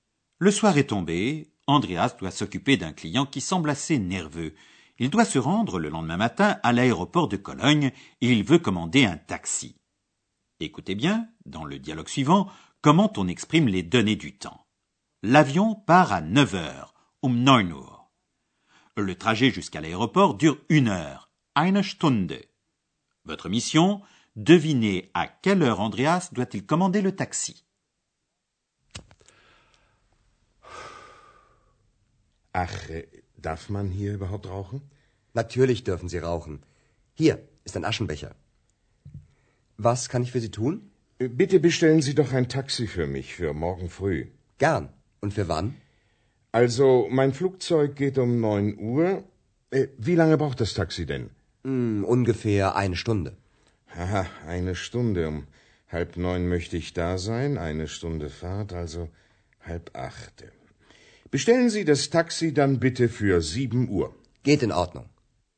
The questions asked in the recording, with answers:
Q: Votre mission, devinez à quelle heure Andreas doit-il commander le taxi.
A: Andreas doit donc commander le taxi pour sept heures le lendemain matin.